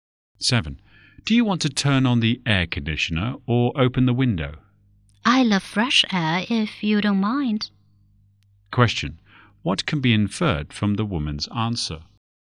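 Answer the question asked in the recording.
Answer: She prefers to open the window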